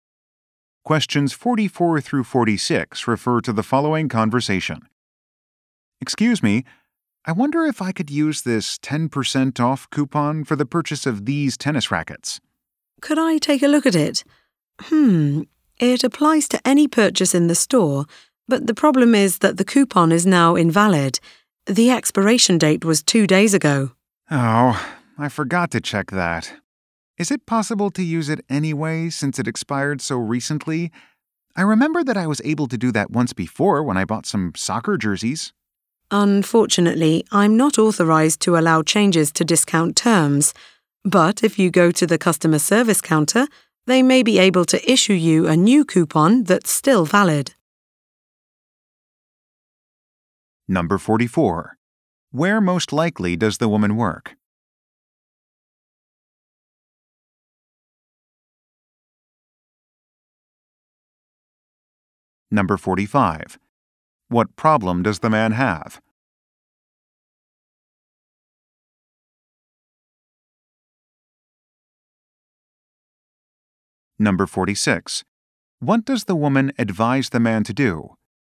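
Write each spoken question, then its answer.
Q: Where most likely does the woman work?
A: At a sporting goods store

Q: What problem does the man have?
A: His coupon has expired

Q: What does the woman advise the man to do?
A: Go to the customer service counter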